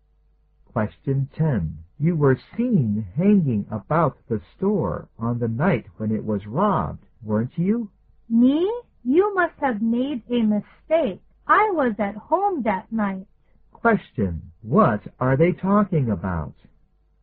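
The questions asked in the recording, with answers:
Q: What are they talking about?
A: A store robbery. The man denies being there and says he was at home.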